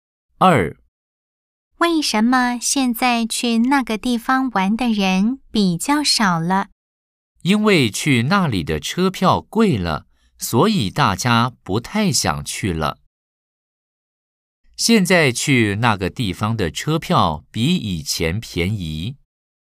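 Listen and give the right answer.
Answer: False (X)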